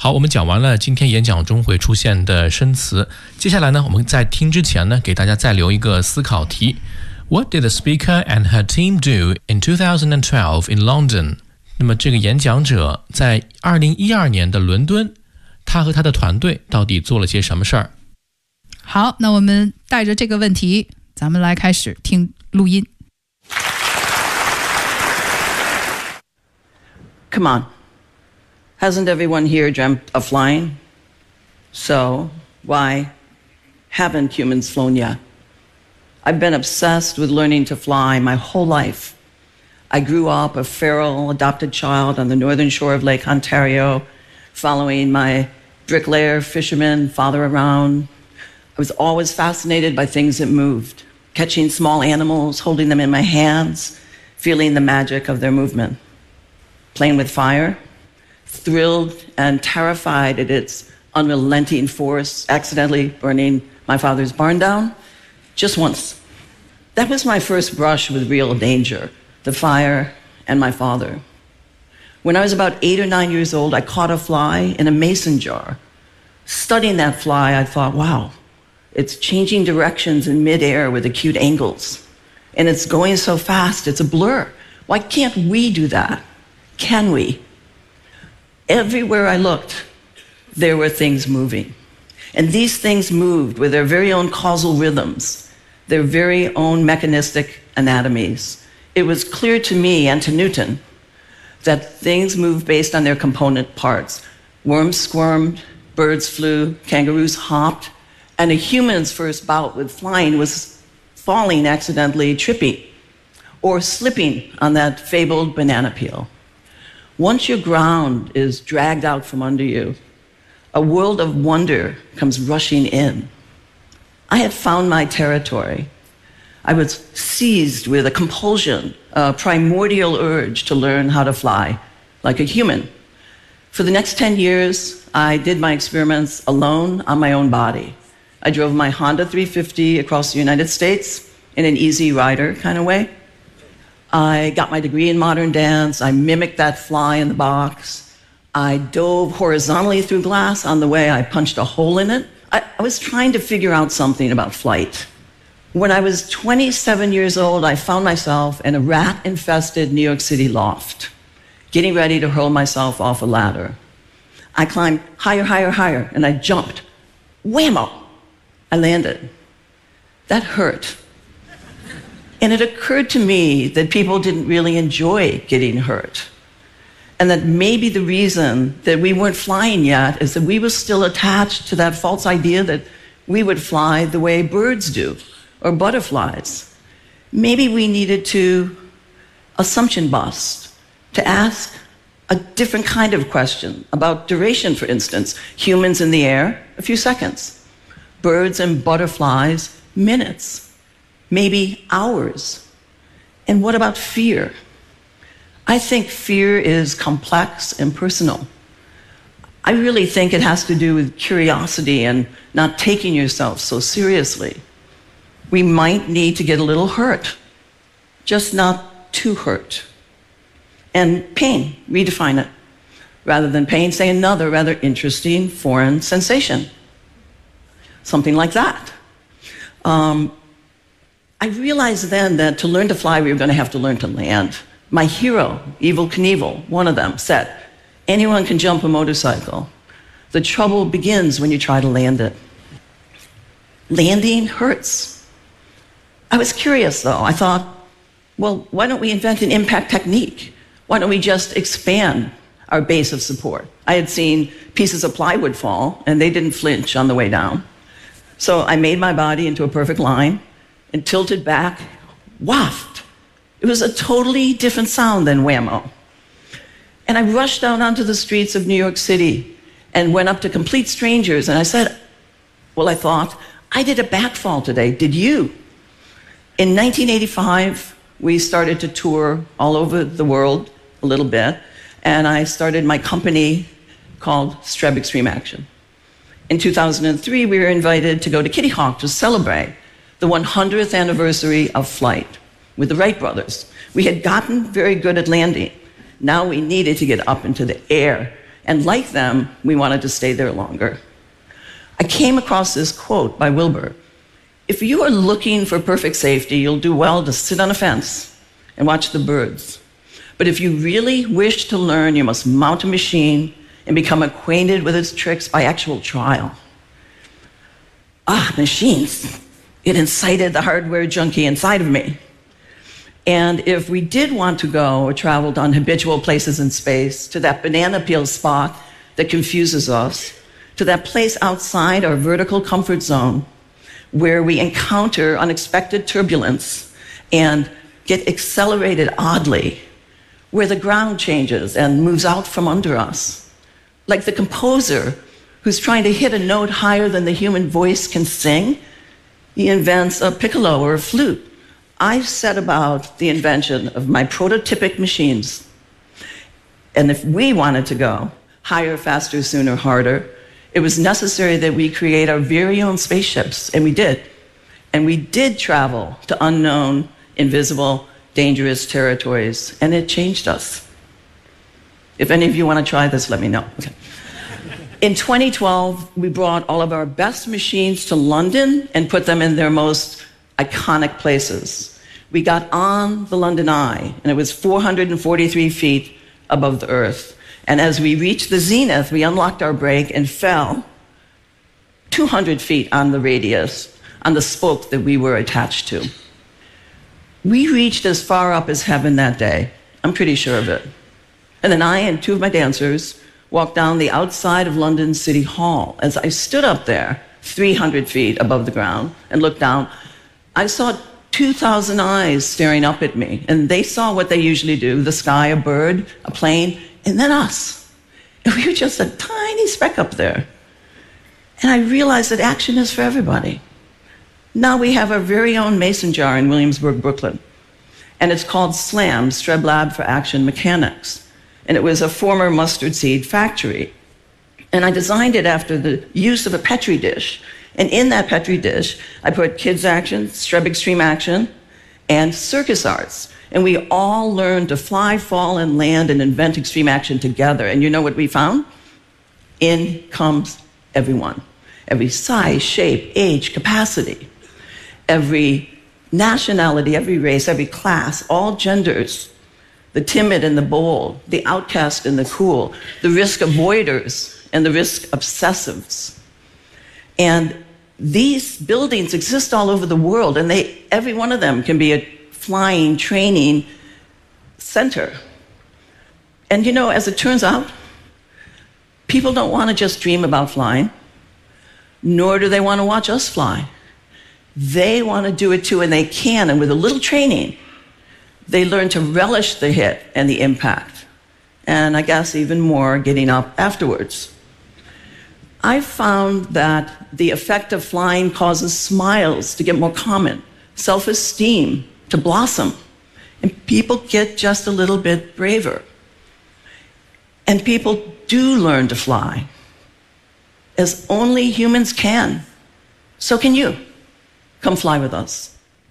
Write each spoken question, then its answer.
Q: What did the speaker and her team do in 2012 in London?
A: In 2012, we brought all of our best machines to London and put them in their most iconic places.